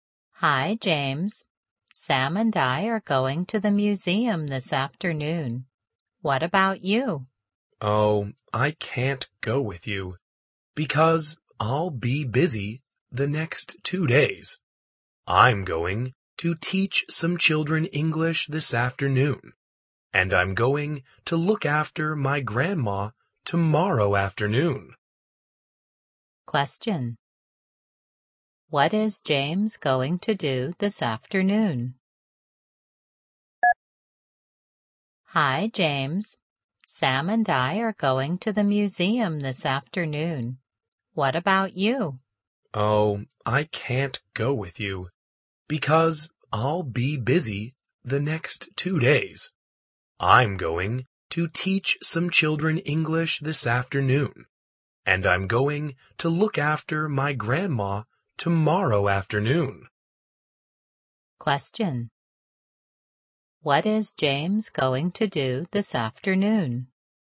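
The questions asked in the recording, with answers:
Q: What is James going to do this afternoon?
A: Teach some children English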